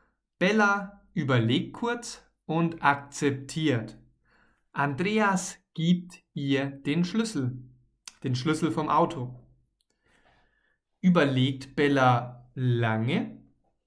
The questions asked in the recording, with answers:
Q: Überlegt Bella lange?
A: Nein, sie überlegt nicht lange.